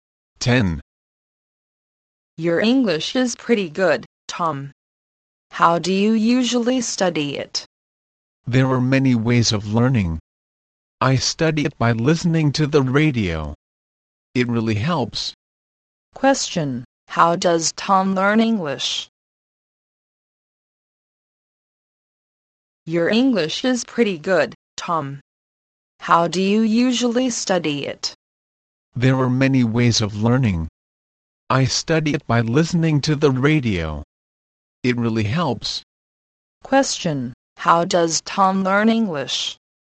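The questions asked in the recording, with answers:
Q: Question: How does Tom learn English?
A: By listening to the radio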